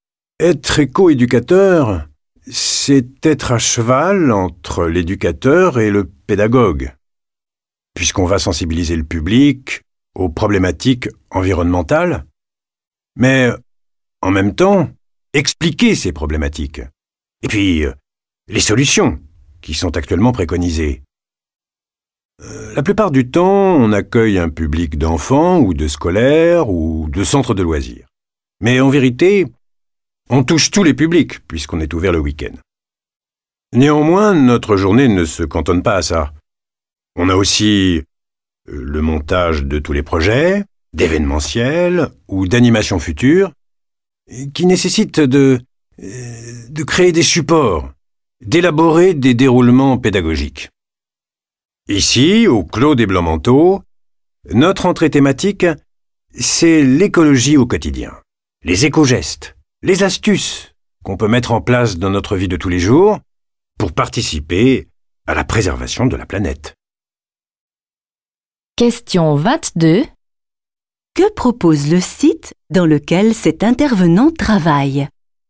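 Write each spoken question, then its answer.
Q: Que propose le site dans lequel cet intervenant travaille ?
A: Une sensibilisation à l'écologie au quotidien : les éco-gestes et astuces pour préserver la planète dans la vie de tous les jours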